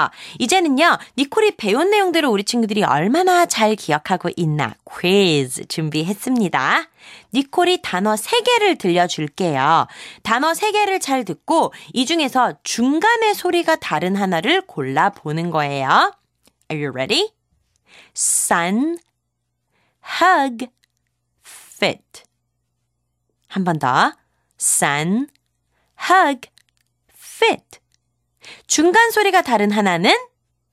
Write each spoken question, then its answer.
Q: 한 번 더. sun, hug, fit. 중간 소리가 다른 하나는?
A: 정답은 바로 fit. 세 번째 단어가 되겠죠.